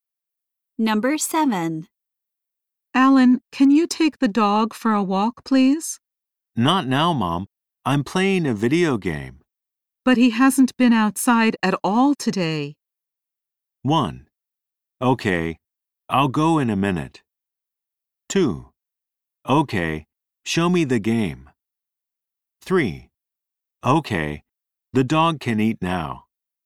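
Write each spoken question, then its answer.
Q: But he hasn't been outside at all today.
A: 1: Okay, I'll go in a minute.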